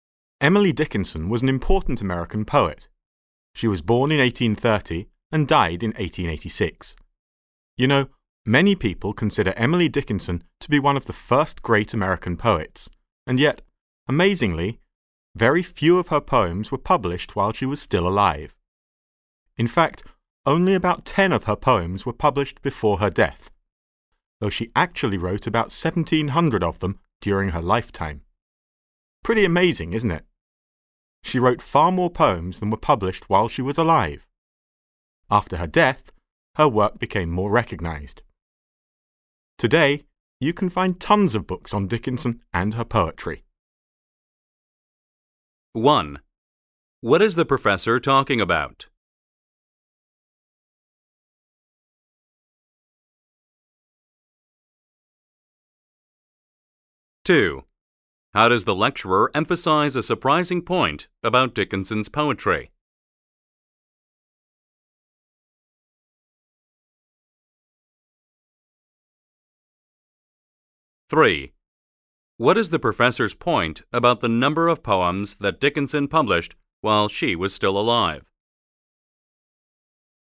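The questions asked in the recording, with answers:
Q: What is the professor talking about?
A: Emily Dickinson, and how few of her poems were published while she was alive

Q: What is the professor's point about the number of poems that Dickinson published while she was still alive?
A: Very few (about 10 of about 1,700) were published before her death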